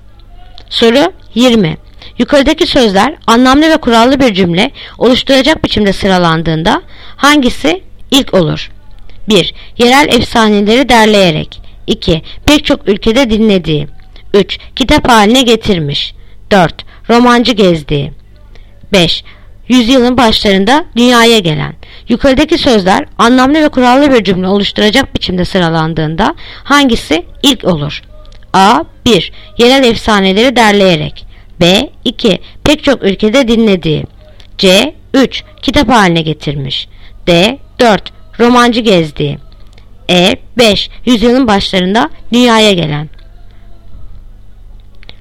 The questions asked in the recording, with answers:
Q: Yukarıdaki sözler anlamlı ve kurallı bir cümle oluşturacak biçimde sıralandığında hangisi ilk olur?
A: Yanıt Edirne. 5. Yüzyılın başlarında dünyaya gelen.